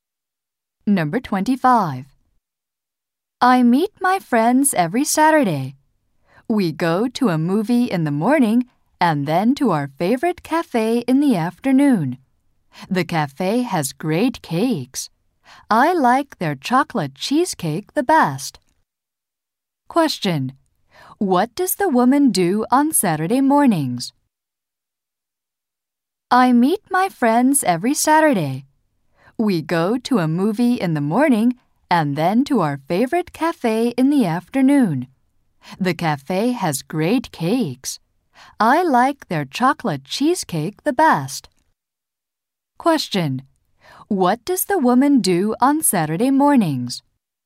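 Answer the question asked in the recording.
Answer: Goes to a movie with her friends.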